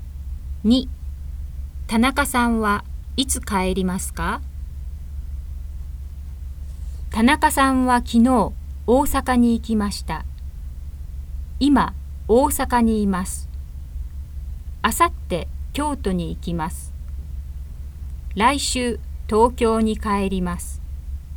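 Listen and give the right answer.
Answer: 来週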